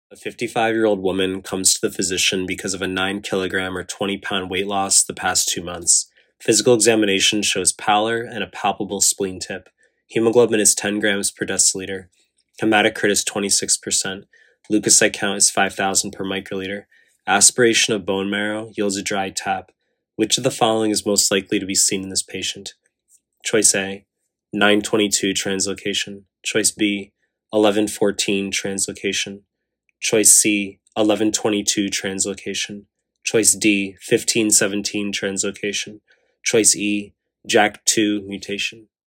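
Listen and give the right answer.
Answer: E: JAK2 mutation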